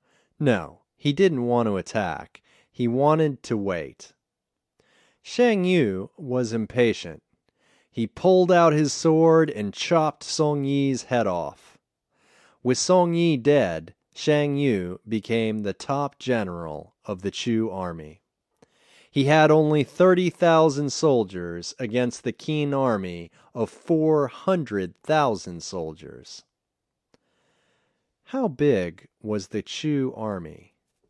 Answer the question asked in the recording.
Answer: The Chu army had 30,000 soldiers.